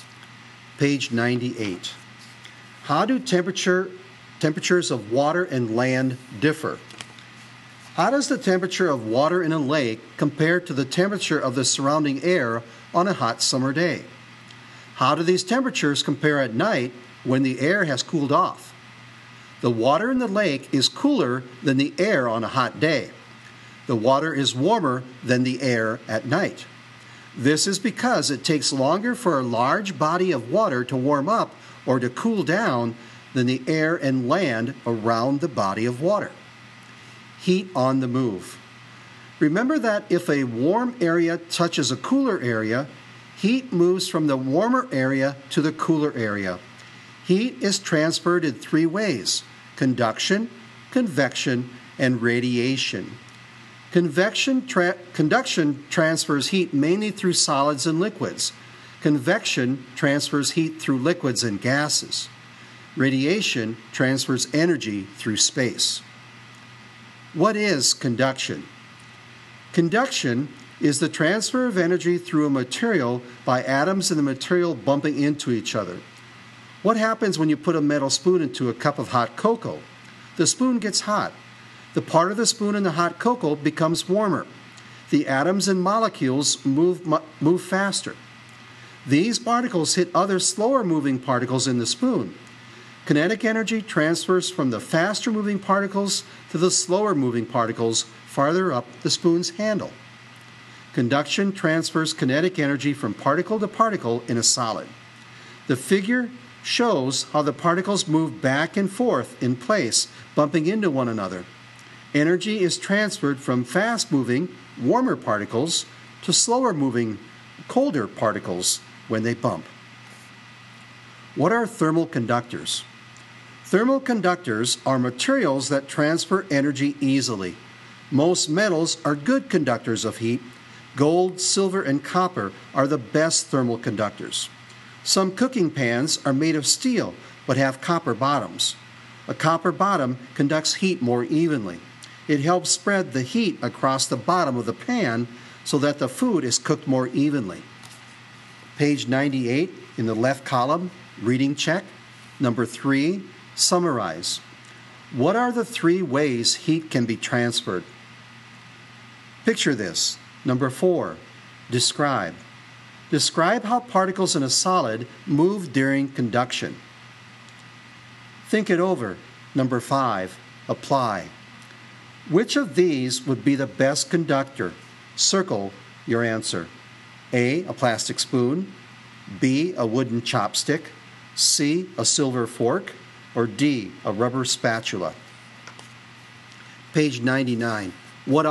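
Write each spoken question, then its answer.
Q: What are the three ways heat can be transferred?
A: Conduction, convection, and radiation

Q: Which of these would be the best conductor?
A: C: a silver fork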